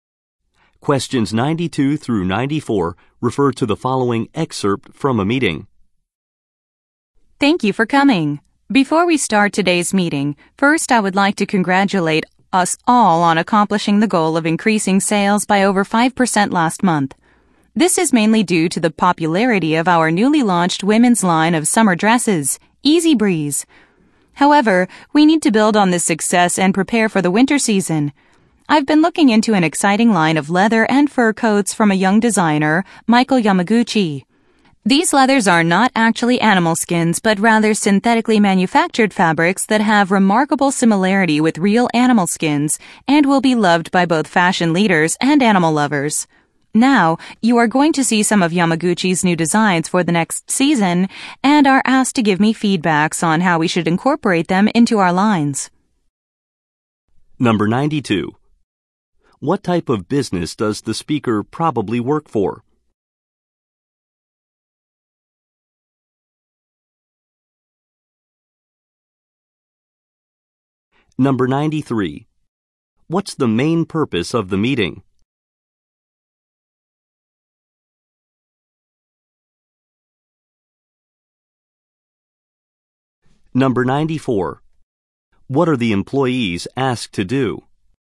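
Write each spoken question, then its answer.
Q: What type of business does the speaker probably work for?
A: A clothing company

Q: What are the employees asked to do?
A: Give feedback on Yamaguchi's new designs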